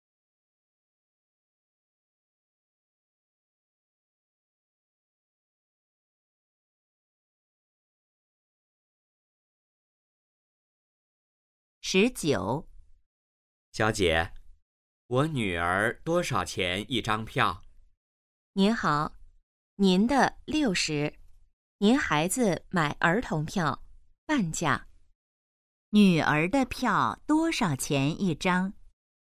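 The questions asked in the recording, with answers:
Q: 女儿的票多少钱一张?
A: 30元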